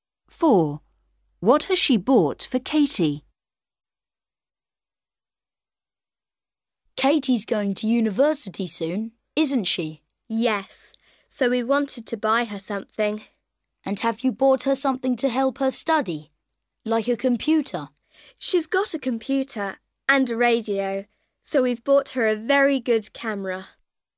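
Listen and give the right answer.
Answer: a camera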